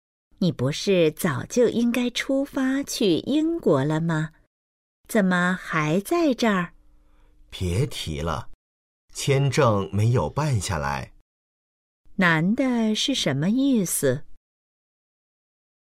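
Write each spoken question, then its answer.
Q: 男的是什么意思?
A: 签证没办下来,去不了英国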